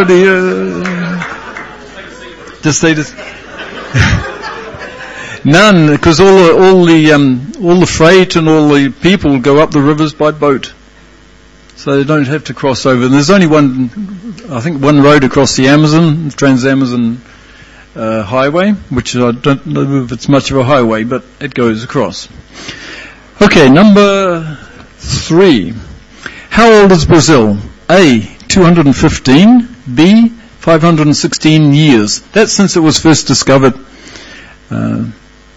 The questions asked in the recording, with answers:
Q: How old is Brazil?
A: Okay, the answer is B, 516 years.